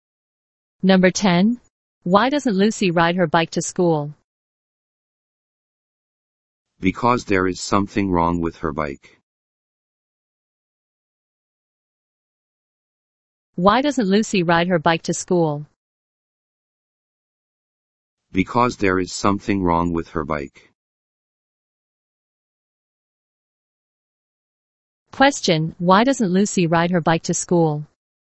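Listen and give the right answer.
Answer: Because there is something wrong with her bike.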